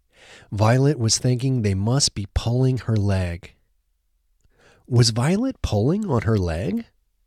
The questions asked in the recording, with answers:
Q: Was Violet pulling on her leg?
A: No, Violet wasn't pulling on her leg.